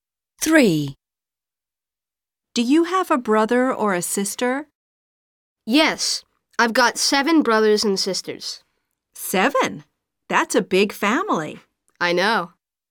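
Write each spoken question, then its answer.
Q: Do you have a brother or a sister?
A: 7 brothers and sisters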